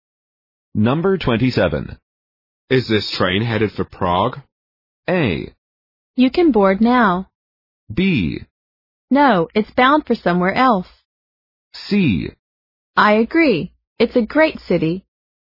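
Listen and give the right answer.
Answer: B: No, it's bound for somewhere else.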